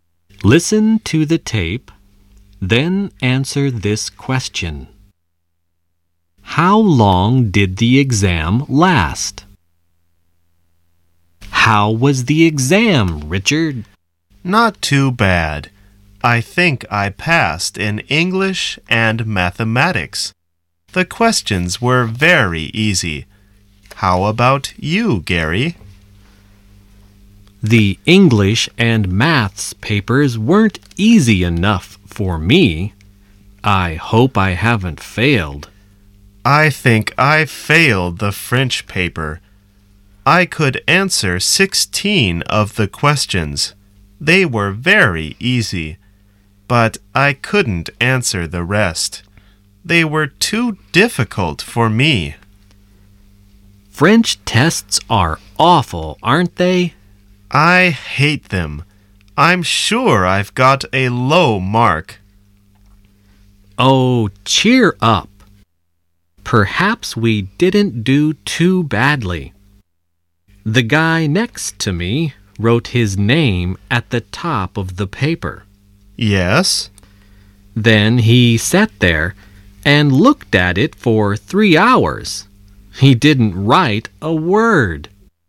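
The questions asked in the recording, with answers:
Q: How long did the exam last?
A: 3 hours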